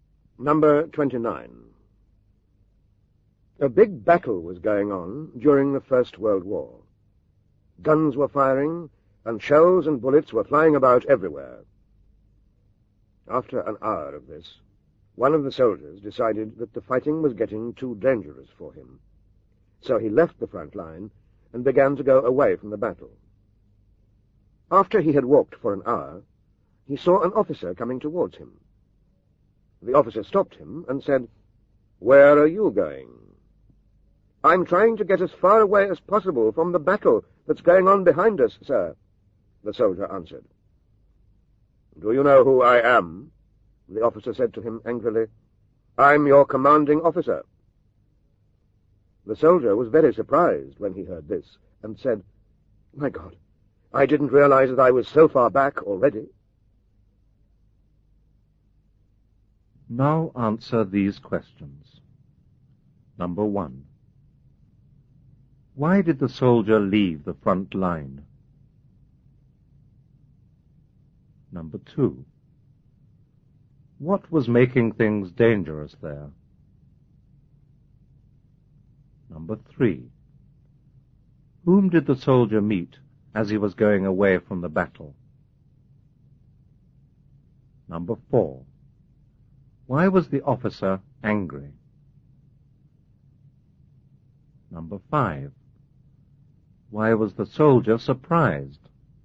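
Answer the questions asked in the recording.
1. Because the fighting was getting too dangerous for him
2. Guns firing, and shells and bullets flying everywhere
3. His commanding officer
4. Because the soldier was running away from the battle
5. He hadn't realized he was already so far back, as far back as the commanding officer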